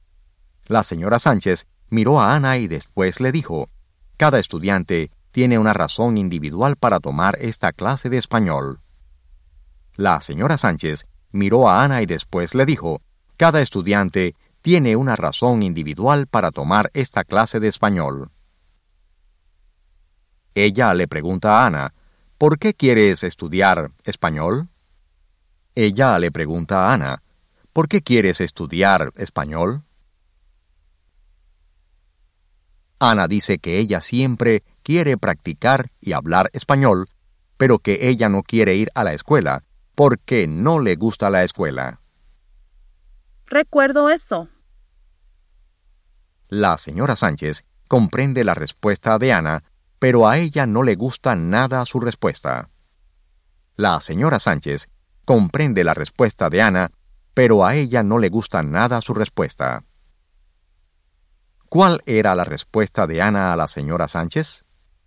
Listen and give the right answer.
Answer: Ana dice que ella siempre quiere practicar y hablar español, pero que ella no quiere ir a la escuela porque no le gusta la escuela.